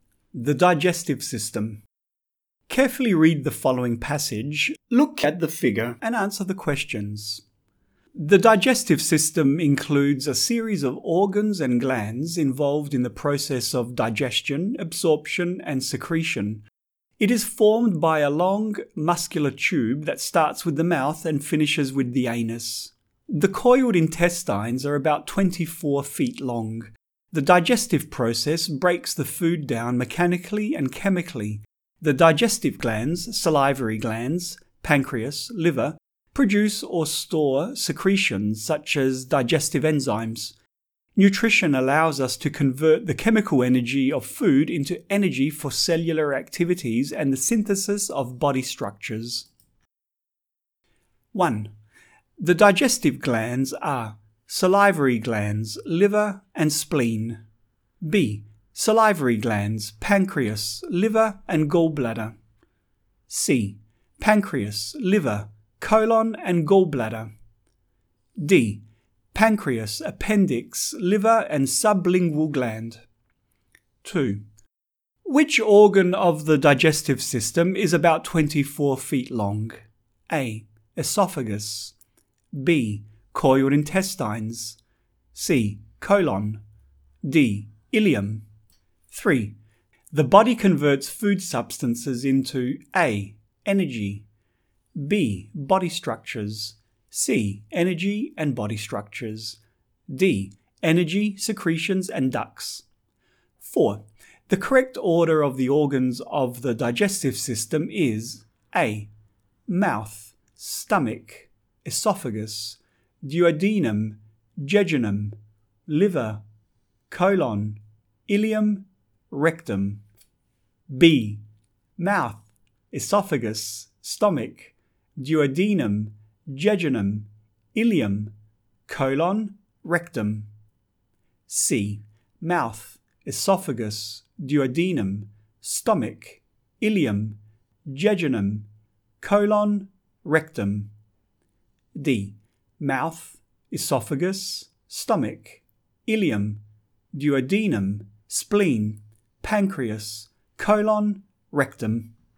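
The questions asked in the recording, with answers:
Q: Which organ of the digestive system is about 24 feet long?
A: B: Coiled intestines.

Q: The body converts food substances into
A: C: Energy and body structures.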